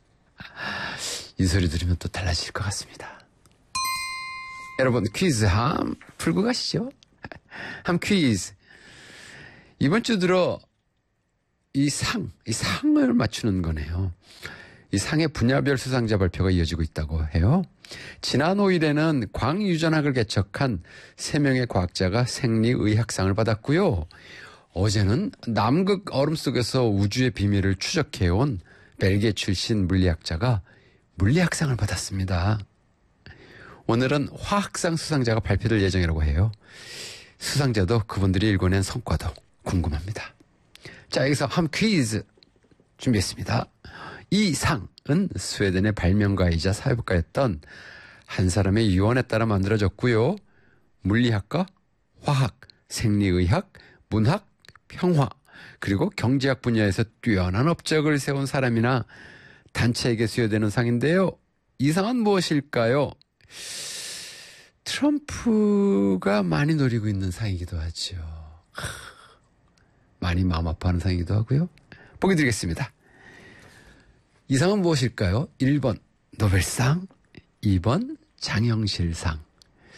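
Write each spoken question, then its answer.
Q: 이 상은 무엇일까요? 1번 노벨상, 2번 장영실상.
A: 1번: 노벨상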